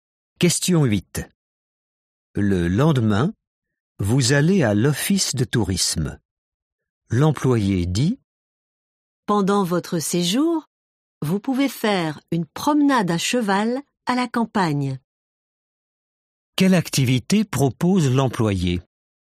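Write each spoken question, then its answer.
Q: Quelle activité propose l'employé ?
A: une promenade à cheval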